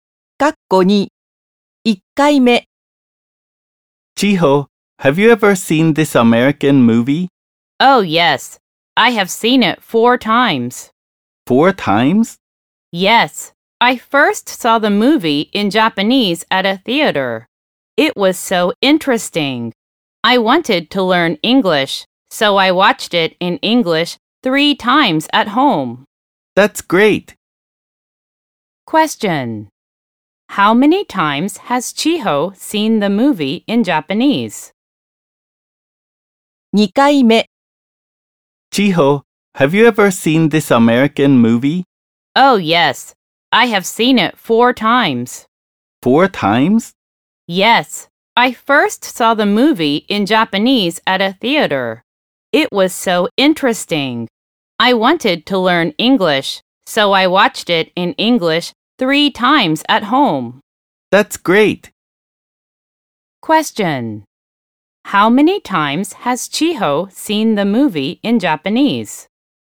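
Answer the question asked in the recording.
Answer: Once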